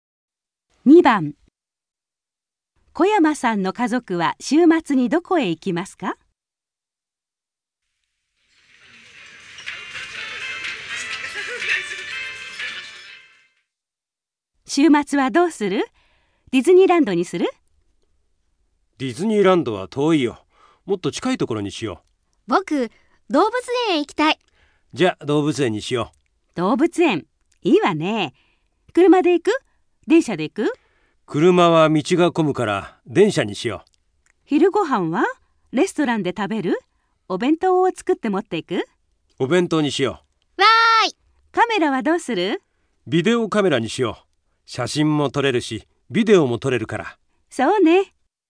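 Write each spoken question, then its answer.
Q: 小山さんの家族は週末にどこへ行きますか?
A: 動物園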